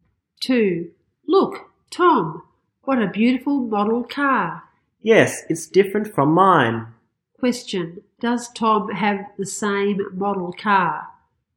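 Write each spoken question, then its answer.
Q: Does Tom have the same model car?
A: No, it's different from his.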